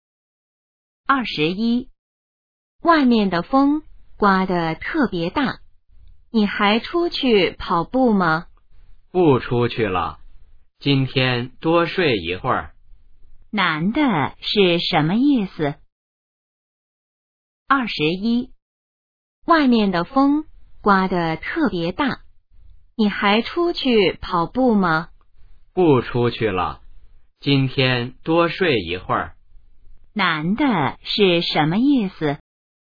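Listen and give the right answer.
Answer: 今天不出去跑步了,想多睡一会儿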